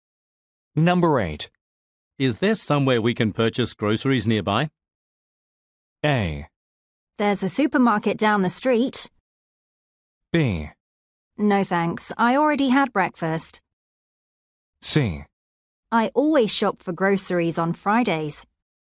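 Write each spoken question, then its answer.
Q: Is there somewhere we can purchase groceries nearby?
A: A: There's a supermarket down the street.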